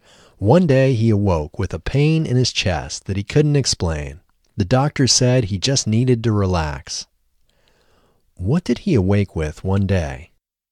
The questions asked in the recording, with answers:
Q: What did he awake with one day?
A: He awoke with a pain in his chest one day.